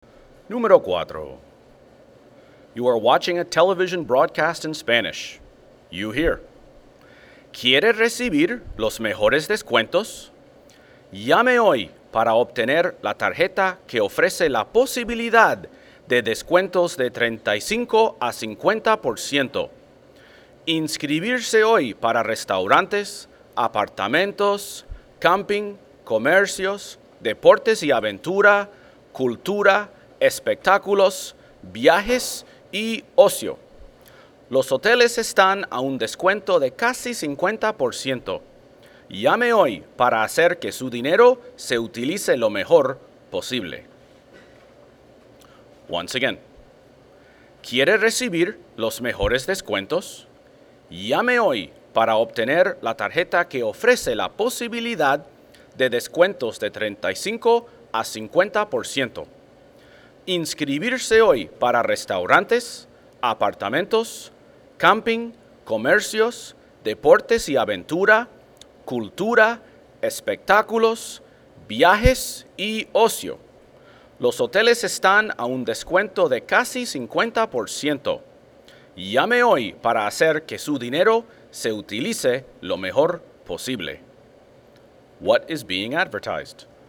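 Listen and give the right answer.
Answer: A discount card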